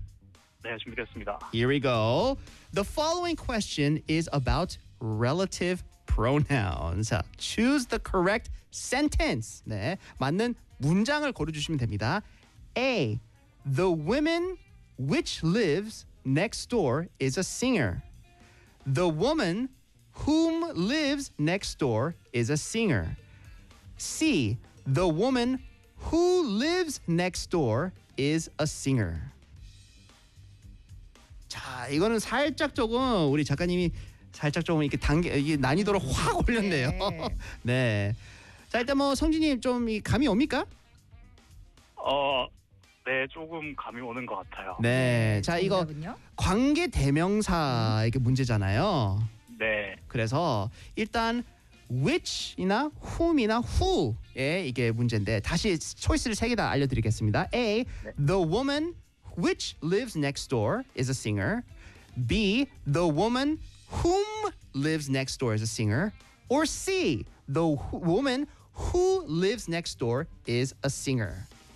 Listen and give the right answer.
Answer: C, the woman who.